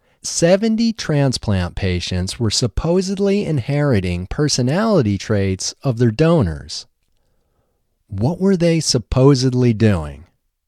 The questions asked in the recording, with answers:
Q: What were they supposedly doing?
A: They were supposedly inheriting personality traits of their donors.